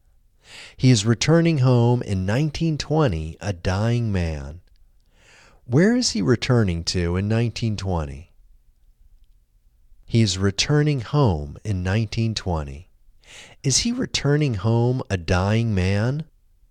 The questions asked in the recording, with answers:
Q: Where is he returning to in 1920?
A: He is returning home in 1920.

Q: Is he returning home a dying man?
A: Yes, he is returning home a dying man.